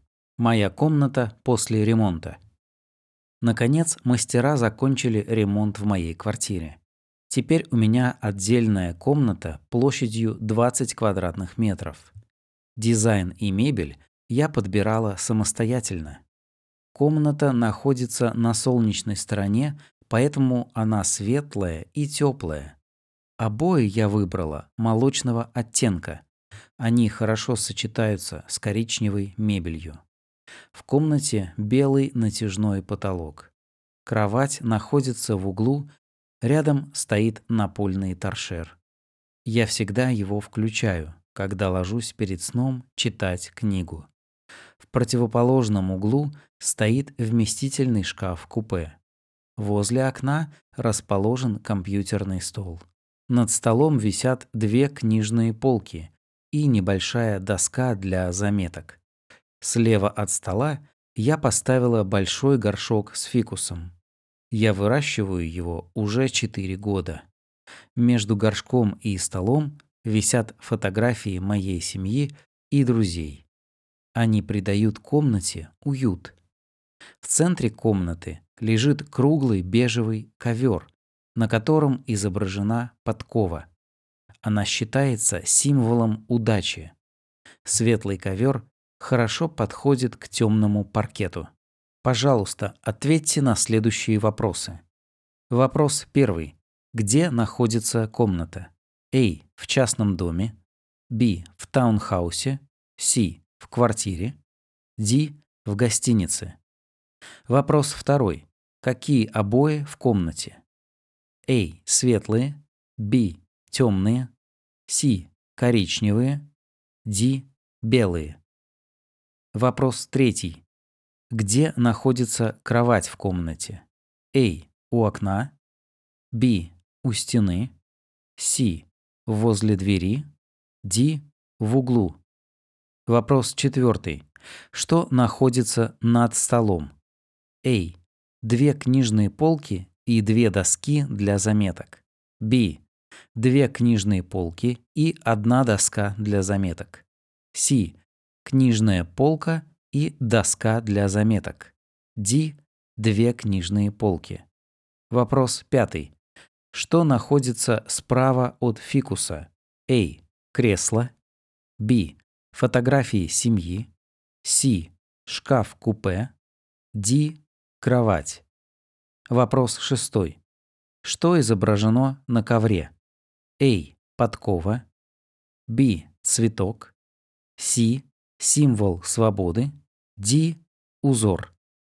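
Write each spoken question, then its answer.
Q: Где находится комната?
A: C: В квартире.

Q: Какие обои в комнате?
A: A: Светлые.

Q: Где находится кровать в комнате?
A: D: В углу.

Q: Что находится над столом?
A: B: Две книжные полки и одна доска для заметок.

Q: Что изображено на ковре?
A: A: Подкова.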